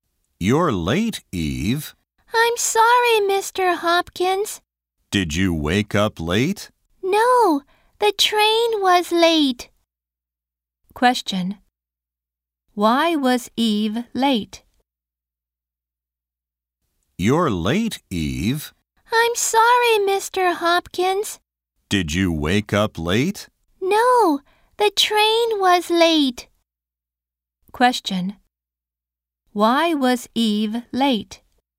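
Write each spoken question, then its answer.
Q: Why was Eve late?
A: The train was late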